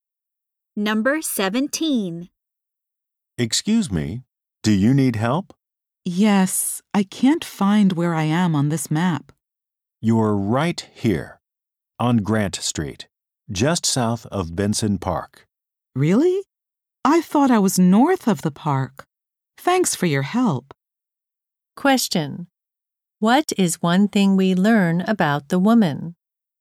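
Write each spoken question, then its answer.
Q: What is one thing we learn about the woman?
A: She thought she was north of the park, but she is south of it.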